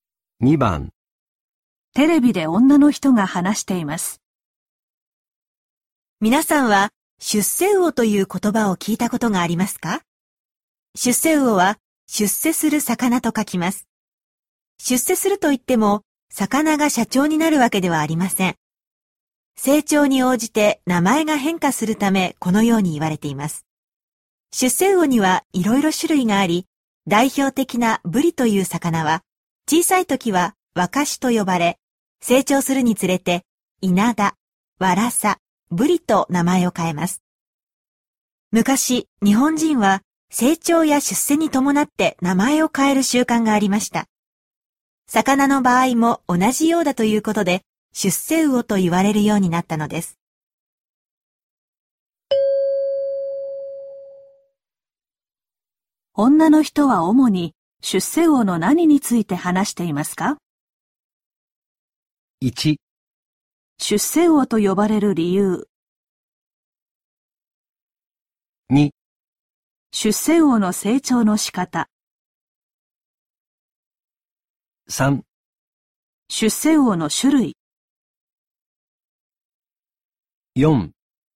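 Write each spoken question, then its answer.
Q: 女の人は主に出世魚の何について話していますか?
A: 1: 出世魚と呼ばれる理由。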